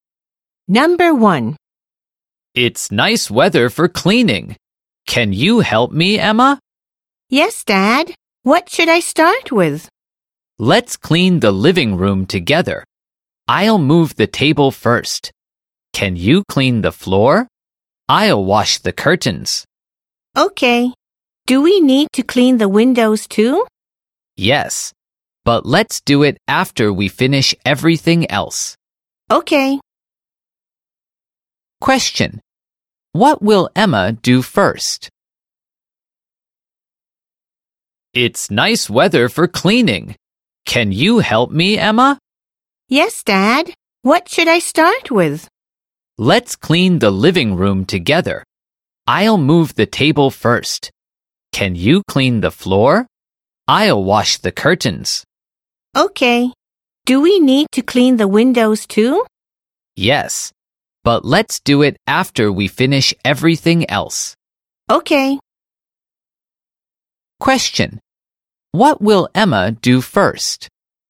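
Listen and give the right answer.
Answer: Clean the floor of the living room.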